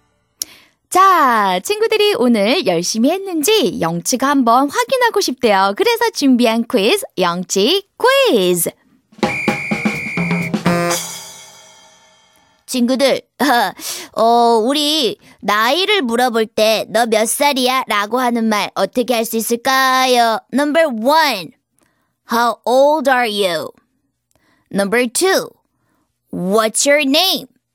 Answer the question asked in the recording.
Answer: 그래요, 친구들. 나이를 물어볼 때 How old are you?